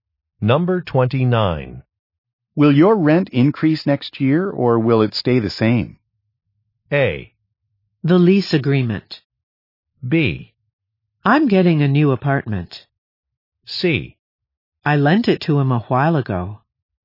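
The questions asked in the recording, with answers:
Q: Will your rent increase next year or will it stay the same?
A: B: I'm getting a new apartment.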